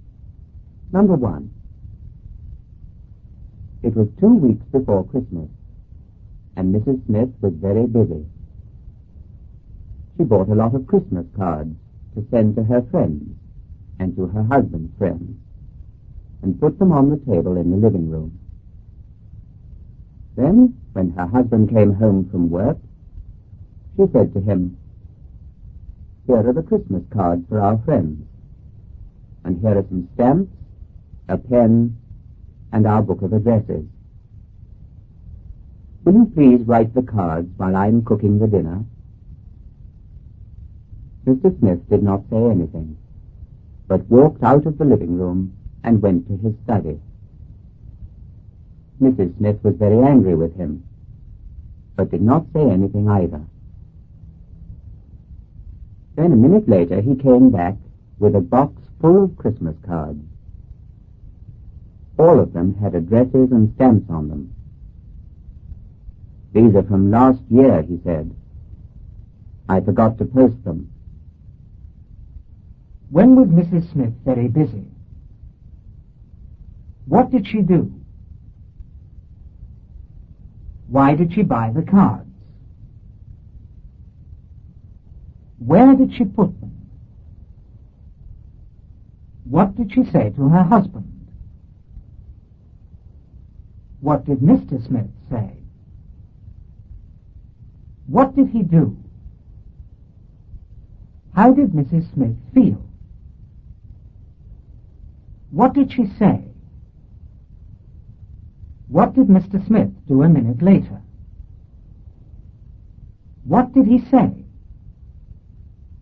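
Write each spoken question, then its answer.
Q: When was Mrs. Smith very busy?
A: Two weeks before Christmas

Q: What did she do?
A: She bought a lot of Christmas cards

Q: Why did she buy the cards?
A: To send to her friends and her husband's friends

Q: Where did she put them?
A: On the table in the living room

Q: What did she say to her husband?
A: Will you please write the cards while I'm cooking the dinner?

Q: What did Mr. Smith say?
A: He did not say anything

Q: What did he do?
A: He walked out of the living room and went to his study

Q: How did Mrs. Smith feel?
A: Very angry

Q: What did she say?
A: She did not say anything

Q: What did Mr. Smith do a minute later?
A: He came back with a box full of last year's Christmas cards

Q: What did he say?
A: These are from last year. I forgot to post them.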